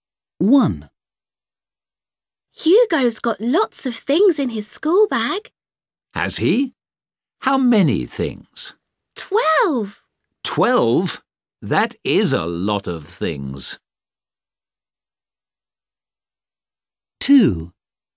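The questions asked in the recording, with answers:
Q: How many things?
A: 12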